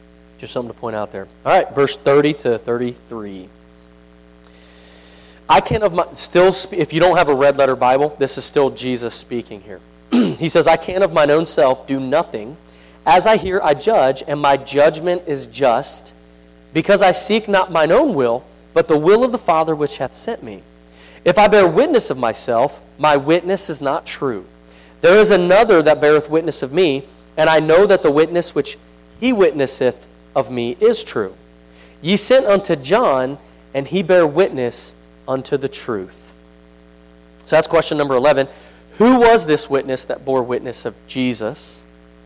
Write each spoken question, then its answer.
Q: Who was this witness that bore witness of Jesus?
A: John the Baptist.